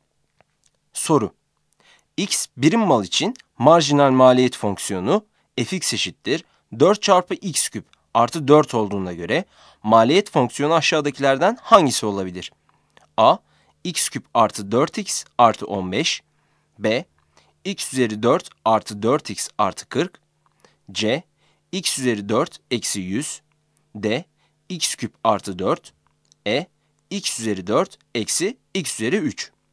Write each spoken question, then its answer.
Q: X birim mal için marjinal maliyet fonksiyonu fx eşittir 4 çarpı x küp artı 4 olduğuna göre maliyet fonksiyonu aşağıdakilerden hangisi olabilir?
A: Yanıt B'dir.